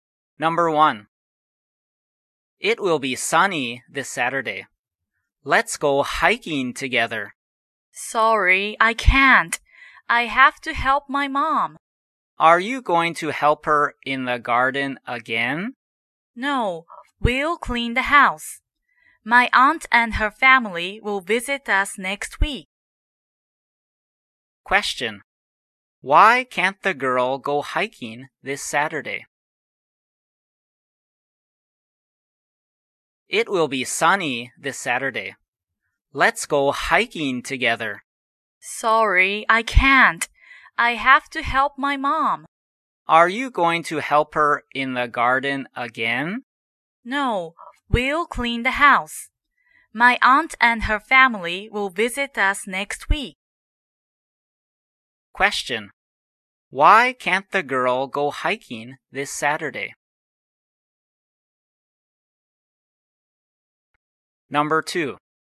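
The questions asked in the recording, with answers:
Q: Why can't the girl go hiking this Saturday?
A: She has to help her mom clean the house because her aunt's family will visit.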